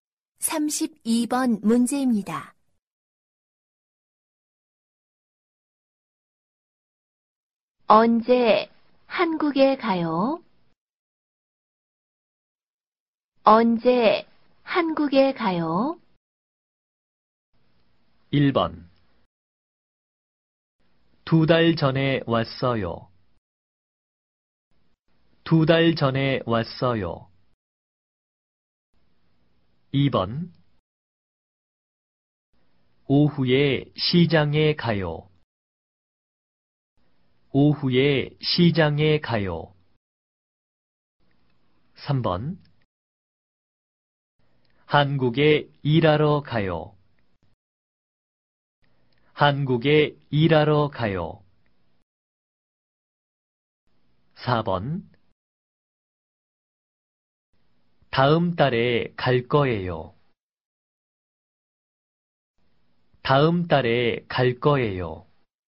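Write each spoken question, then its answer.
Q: 언제 한국에 가요?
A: 4: 다음 달에 갈 거예요.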